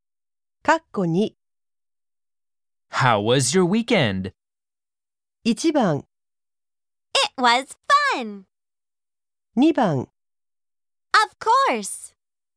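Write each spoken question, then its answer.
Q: How was your weekend?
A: 1: It was fun.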